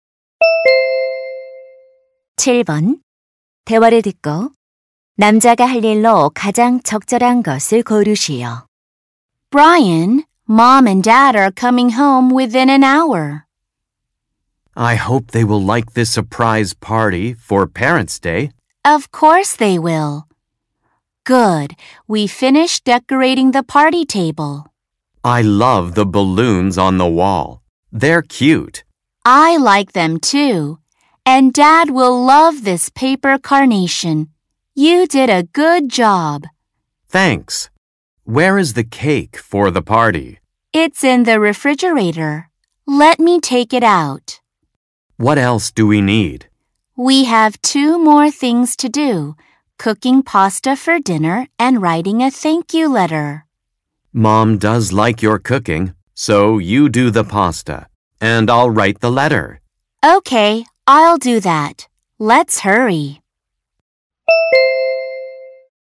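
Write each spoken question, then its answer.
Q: 대화를 듣고 남자가 할 일로 가장 적절한 것을 고르시오.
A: 감사 편지 쓰기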